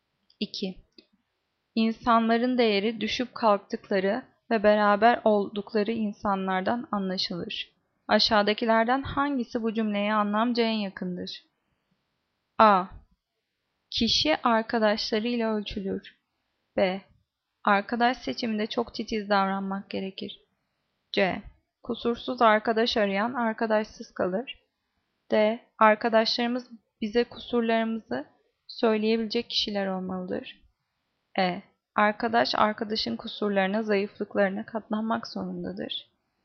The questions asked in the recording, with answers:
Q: Aşağıdakilerden hangisi bu cümleye anlamca en yakındır?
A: Cevap A. Kişi arkadaşlarıyla ölçülür.